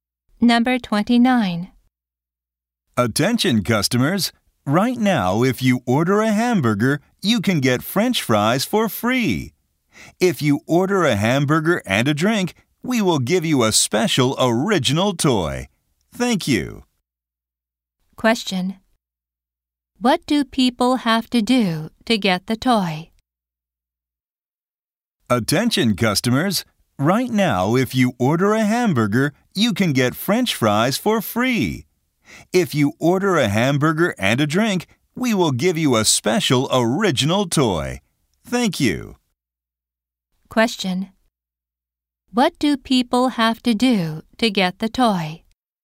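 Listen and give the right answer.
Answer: Order a hamburger and a drink.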